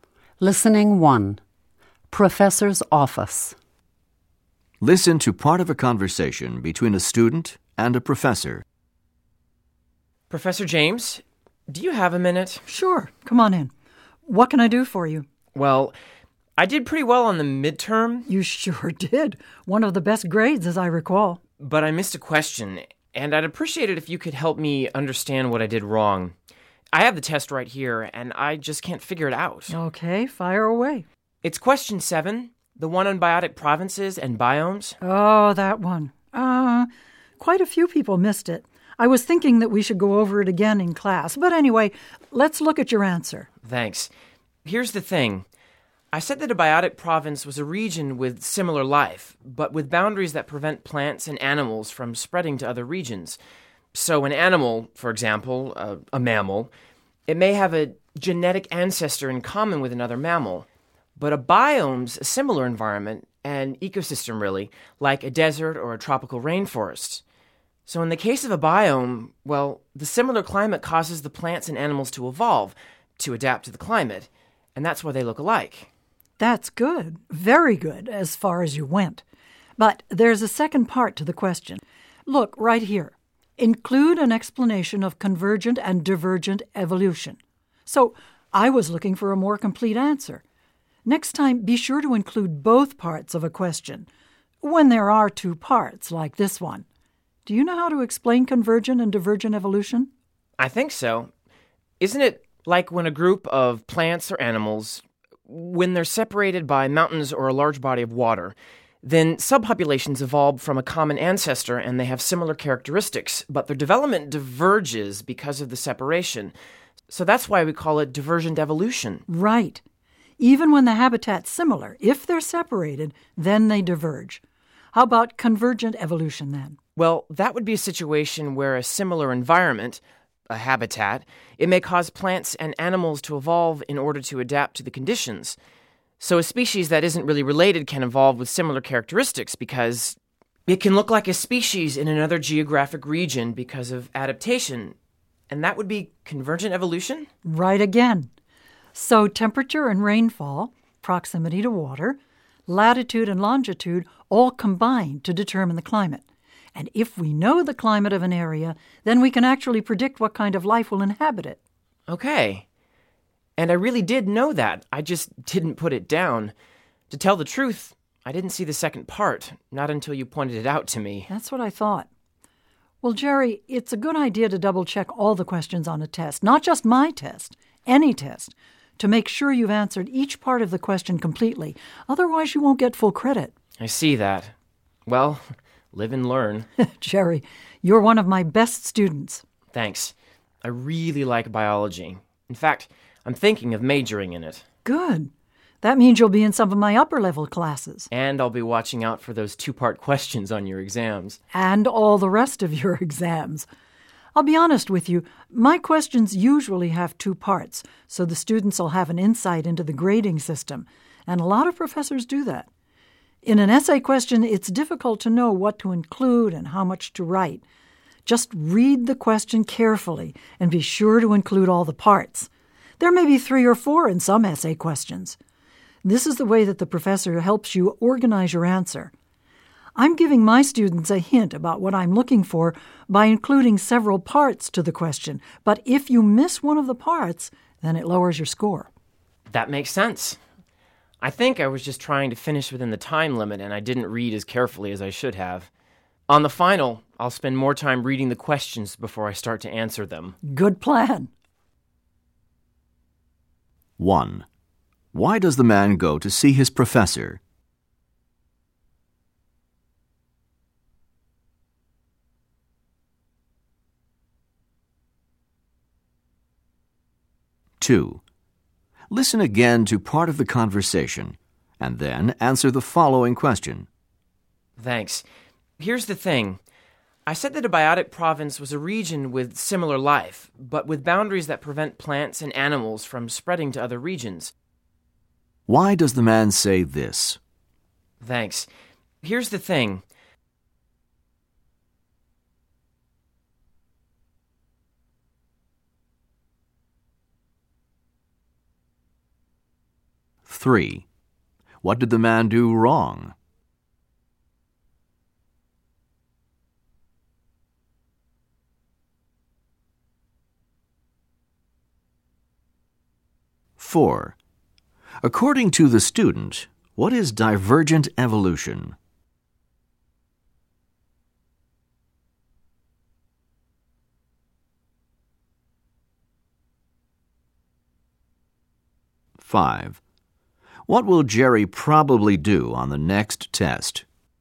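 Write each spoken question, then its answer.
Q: Why does the man go to see his professor?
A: To ask why he lost points on a midterm question he missed

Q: What did the man do wrong?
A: He answered only the first part of a two-part question

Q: According to the student, what is divergent evolution?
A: Subpopulations with a common ancestor develop differently because they are separated by barriers like mountains or water

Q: What will Jerry probably do on the next test?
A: Read the questions more carefully and answer every part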